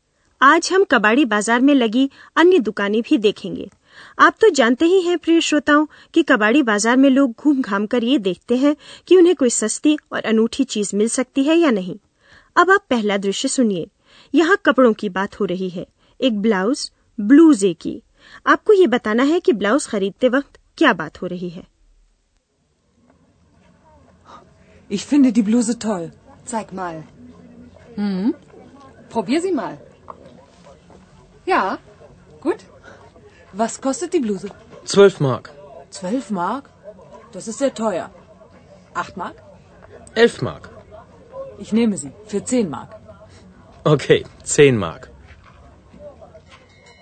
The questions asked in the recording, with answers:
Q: आपको ये बताना है कि blouse खरीदते वक्त क्या बात हो रही है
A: यह एक ठेठ बाजार का दृश्य है यहाँ मोल तोल कर दाम कम करवाने की कोशिश हो रही है